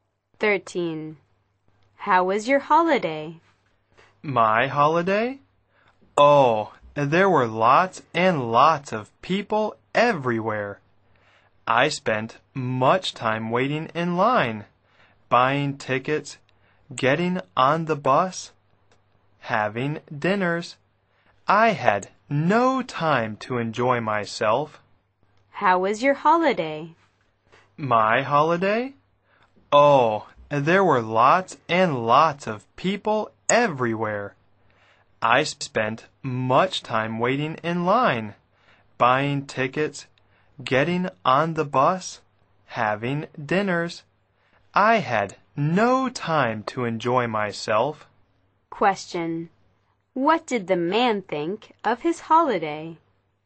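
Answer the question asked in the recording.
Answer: It was bad; too crowded, no time to enjoy himself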